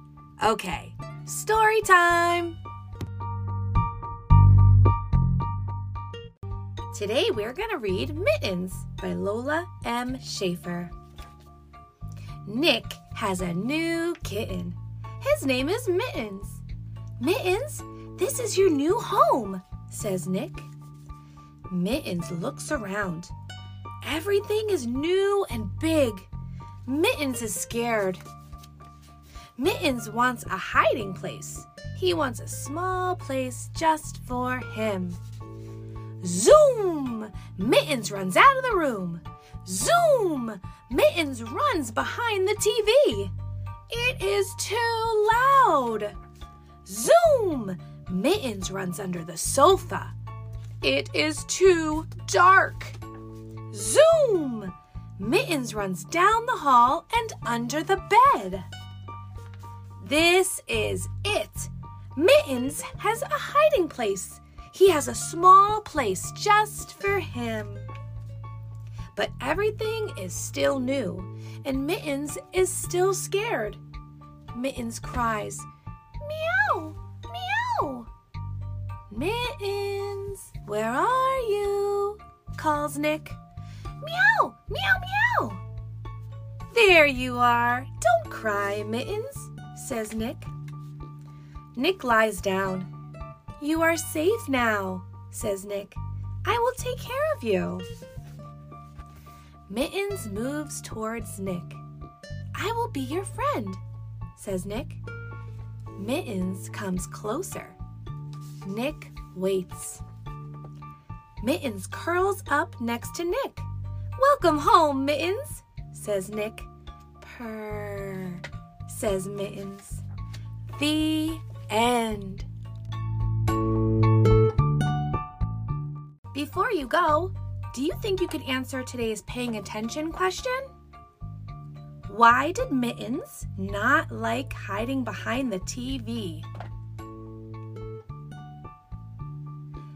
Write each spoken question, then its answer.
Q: Why did Mittens not like hiding behind the TV?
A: because it was too loud